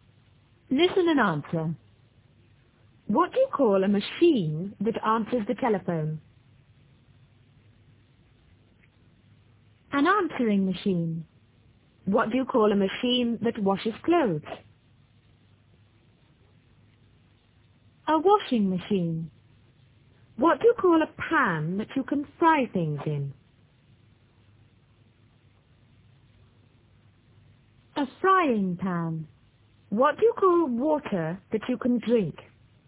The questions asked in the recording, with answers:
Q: What do you call a machine that answers the telephone?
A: An answering machine.

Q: What do you call a machine that washes clothes?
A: A washing machine.

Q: What do you call a pan that you can fry things in?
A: A frying pan.